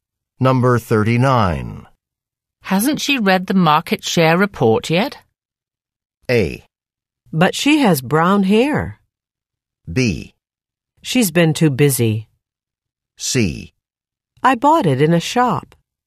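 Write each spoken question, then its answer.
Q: Hasn't she read the market share report yet?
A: B: She's been too busy.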